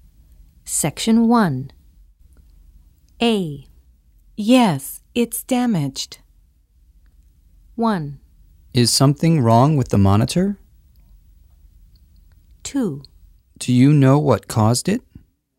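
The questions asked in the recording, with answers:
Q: Yes, it's damaged.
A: 1: Is something wrong with the monitor?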